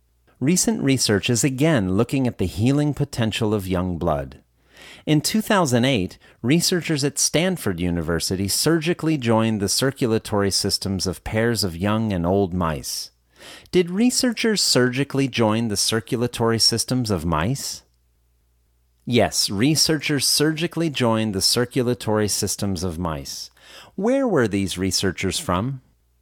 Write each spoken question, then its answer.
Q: Where were these researchers from?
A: These researchers were from Stanford University.